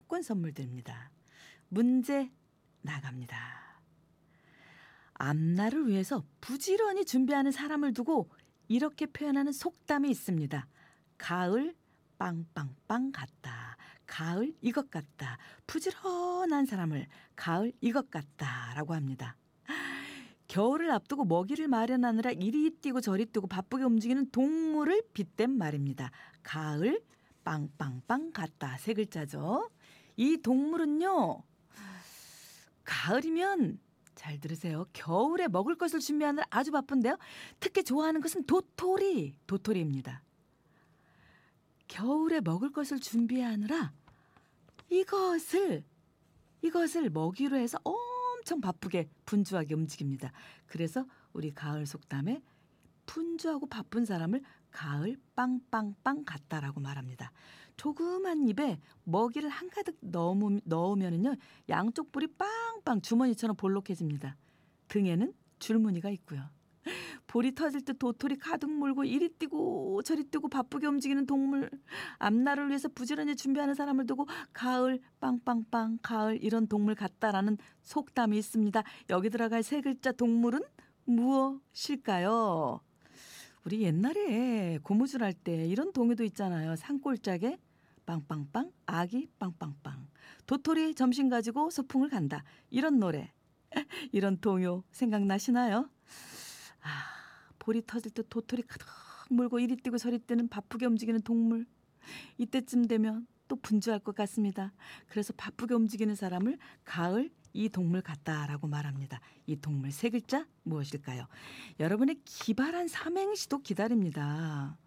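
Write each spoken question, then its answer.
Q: 이 동물 세 글자 무엇일까요?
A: 다람쥐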